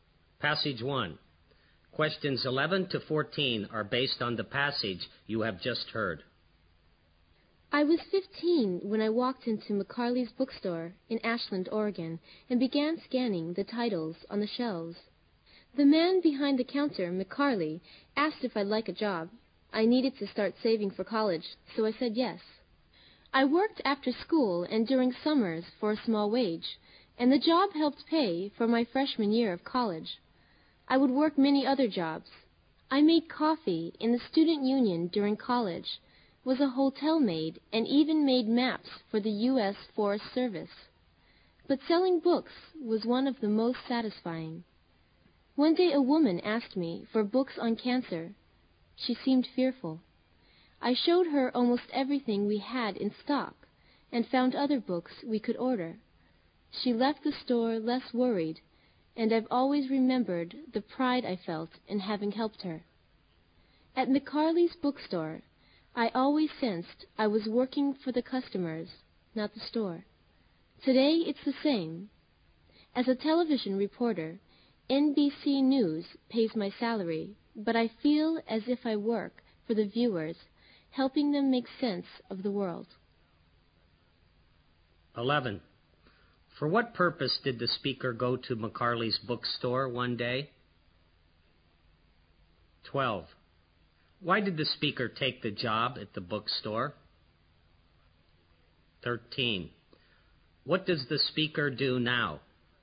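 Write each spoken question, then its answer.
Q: Why did the speaker take the job at the bookstore?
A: To save money for college

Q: What does the speaker do now?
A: She is a television reporter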